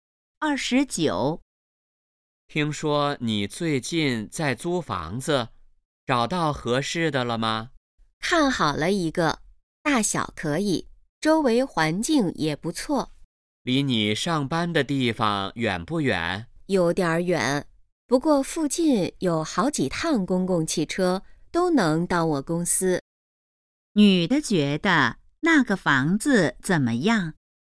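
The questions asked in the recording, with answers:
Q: 女的觉得那个房子怎么样?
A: 还不错,但离公司有点远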